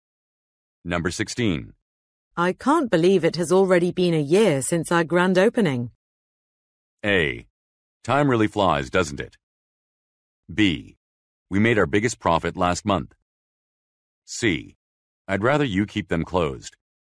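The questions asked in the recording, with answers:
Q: I can't believe it has already been a year since our grand opening.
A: A: Time really flies, doesn't it?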